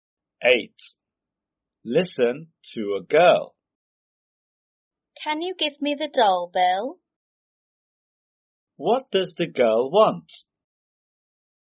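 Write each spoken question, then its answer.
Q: What does the girl want?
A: the doll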